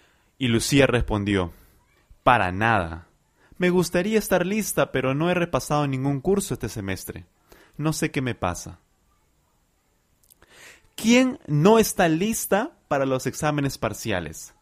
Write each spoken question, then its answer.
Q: ¿Quién no está lista para los exámenes parciales?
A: Lucía. Lucía no está preparada para los exámenes parciales.